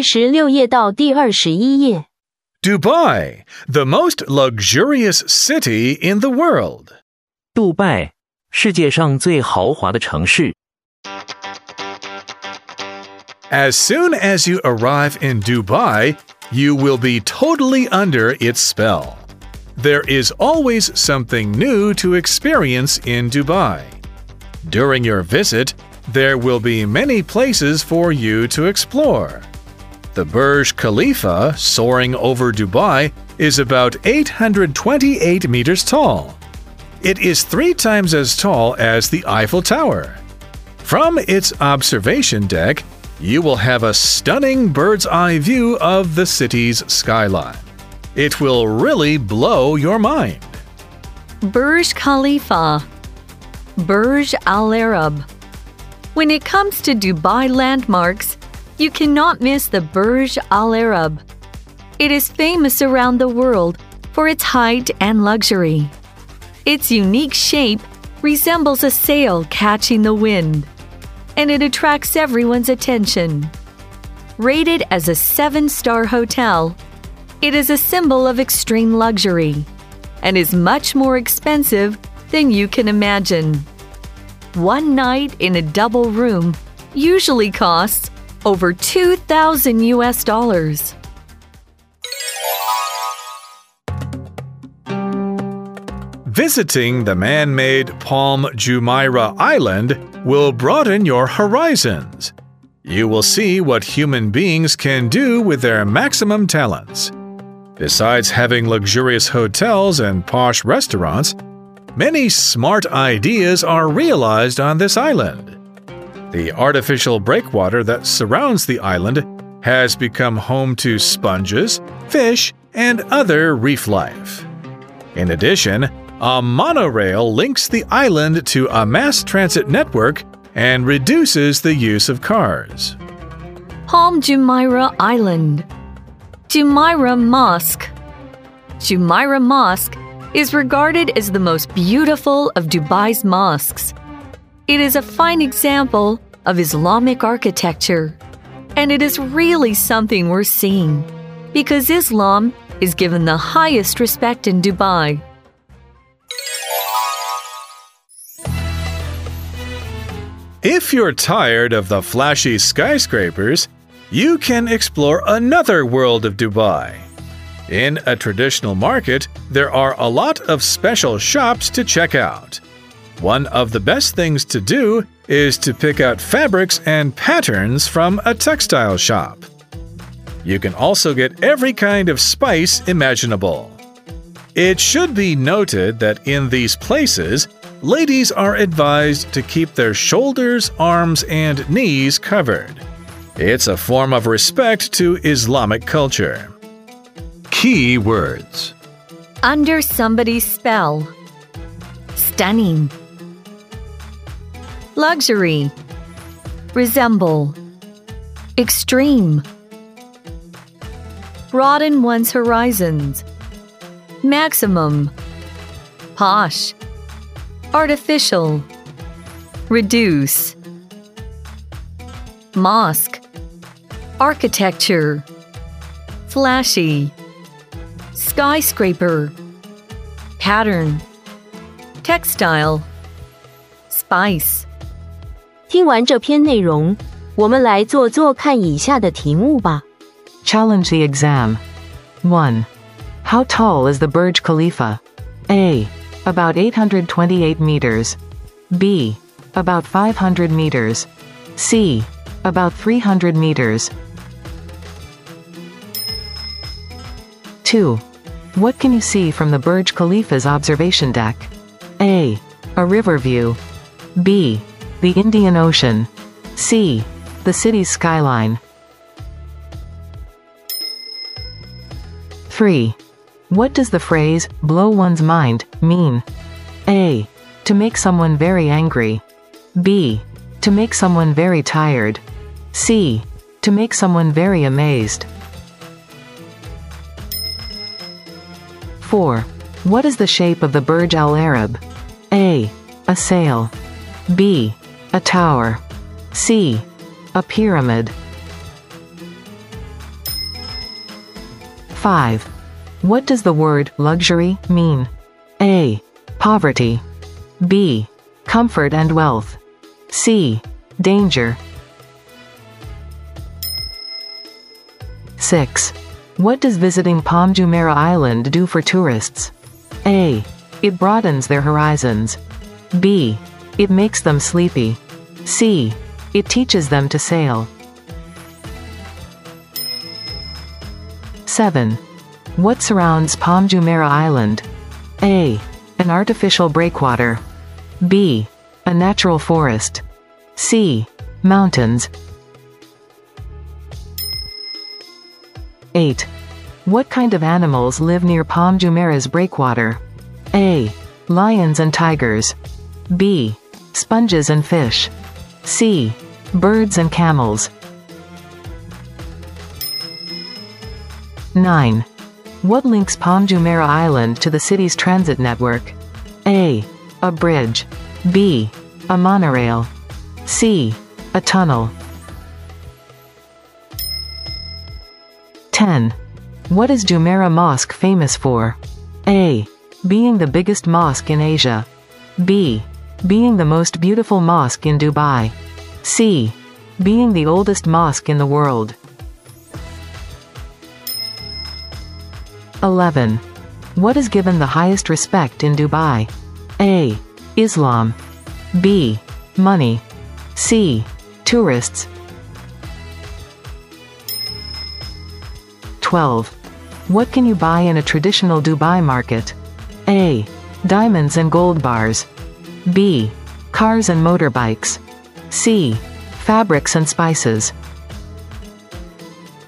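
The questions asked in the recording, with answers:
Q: How tall is the Burj Khalifa?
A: A: About 828 meters.

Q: What can you see from the Burj Khalifa's observation deck?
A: C: The city's skyline.

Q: What does the phrase, blow one's mind, mean?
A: C: To make someone very amazed.

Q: What is the shape of the Burj Al Arab?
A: A: A sail.

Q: What does the word luxury mean?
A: B: Comfort and wealth.

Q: What does visiting Palm Jumeirah Island do for tourists?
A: A: It broadens their horizons.

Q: What surrounds Palm Jumeirah Island?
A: A: An artificial breakwater.

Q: What kind of animals live near Palm Jumeirah's breakwater?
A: B: Sponges and fish.

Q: What links Palm Jumeirah Island to the city's transit network?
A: B: A monorail.

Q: What is Jumeirah Mosque famous for?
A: B: Being the most beautiful mosque in Dubai.

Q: What is given the highest respect in Dubai?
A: A: Islam.

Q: What can you buy in a traditional Dubai market?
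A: C: Fabrics and spices.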